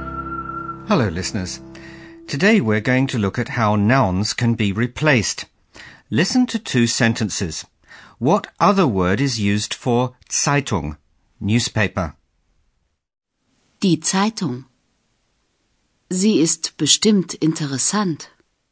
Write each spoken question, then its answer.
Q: What other word is used for Zeitung, newspaper?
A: The word Zeitung is replaced by the pronoun Sie.